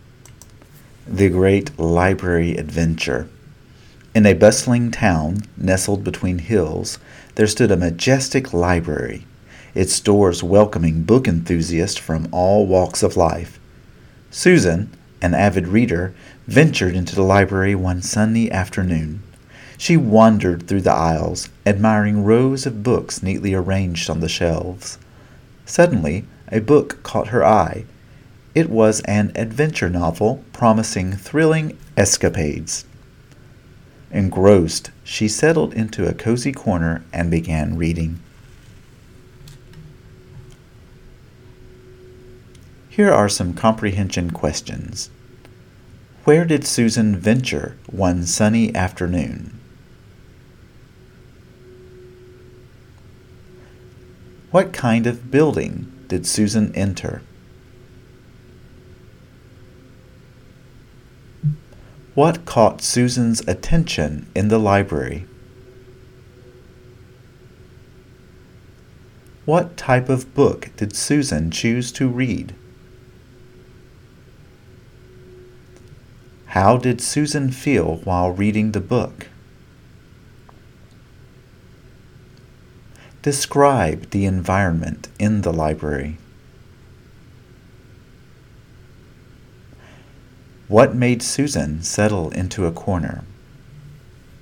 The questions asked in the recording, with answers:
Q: Where did Susan venture one sunny afternoon?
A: Susan ventured into the library.

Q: What kind of building did Susan enter?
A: she entered a majestic library.

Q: What caught Susan's attention in the library?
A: a thrilling adventure novel caught Susan's attention.

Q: What type of book did Susan choose to read?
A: Susan chose to read an adventure novel.

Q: How did Susan feel while reading the book?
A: Susan felt engrossed while reading the book.

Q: What made Susan settle into a corner?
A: Susan settled into a cozy corner because she was engrossed in the book's adventure.